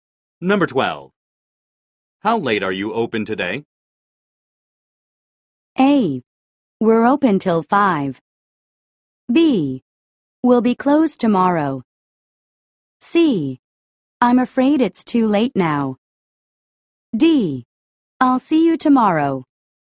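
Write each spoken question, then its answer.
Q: How late are you open today?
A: A: We're open till 5.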